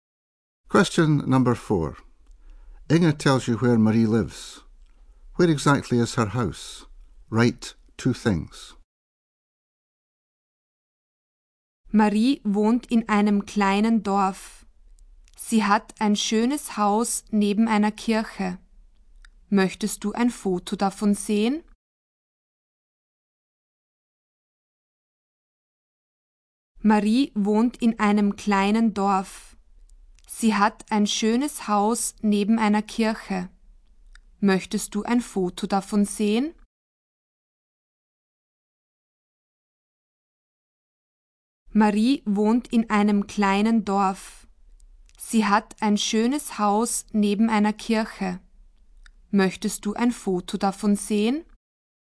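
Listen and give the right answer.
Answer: In a small village, next to a church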